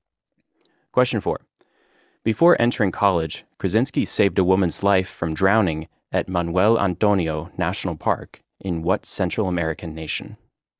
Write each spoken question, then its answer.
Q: Before entering college, Krasinski saved a woman's life from drowning at Manuel Antonio National Park in what Central American nation?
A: It was Costa Rica.